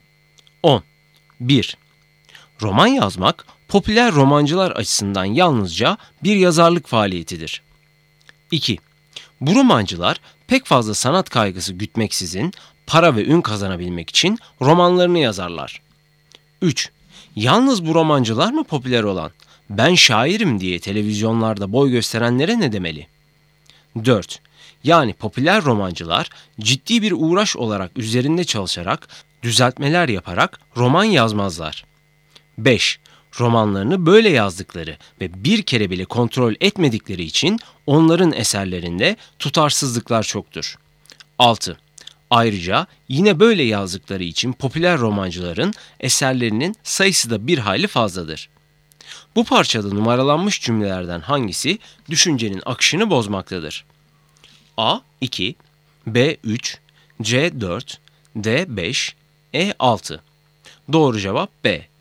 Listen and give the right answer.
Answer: Doğru cevap B.